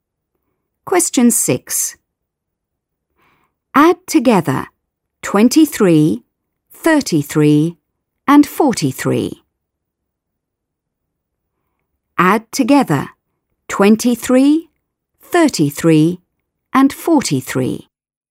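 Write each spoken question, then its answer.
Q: Add together 23, 33 and 43.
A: 99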